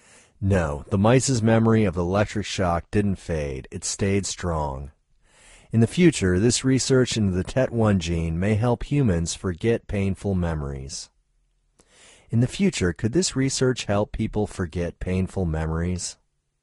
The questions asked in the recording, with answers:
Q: In the future, could this research help people forget painful memories?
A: Yes, in the future, this research could help humans forget painful memories.